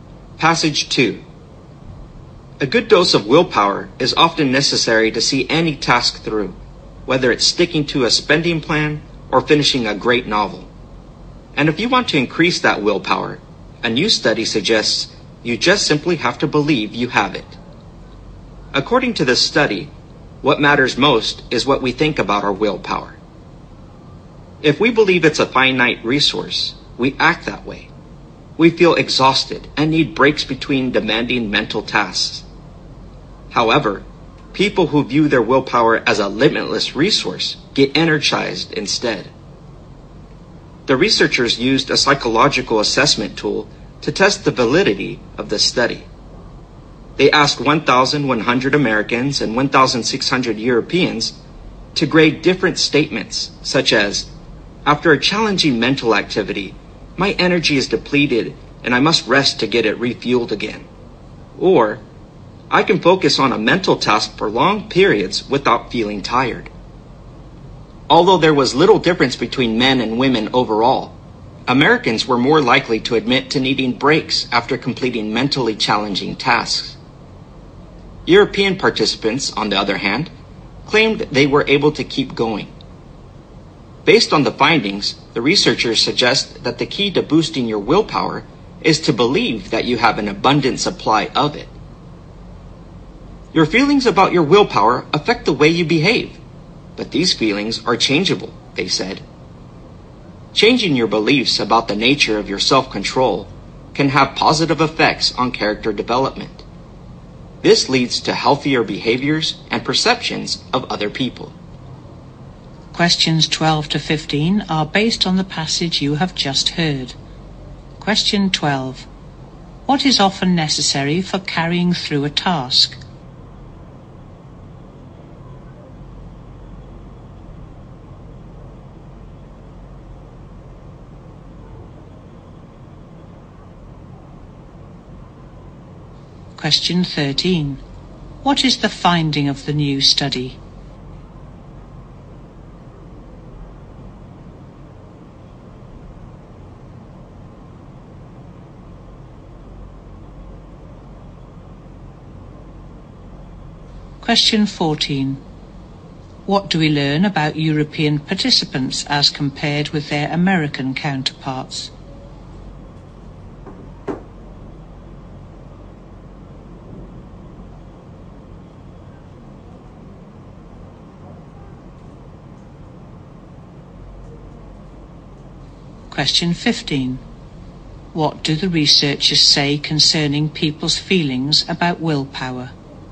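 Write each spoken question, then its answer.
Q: What is often necessary for carrying through a task?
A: Willpower

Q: What is the finding of the new study?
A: What matters most is what we believe about our willpower

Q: What do we learn about European participants as compared with their American counterparts?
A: They said they could keep going without breaks after mentally challenging tasks

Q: What do the researchers say concerning people's feelings about willpower?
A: They affect how people behave and can be changed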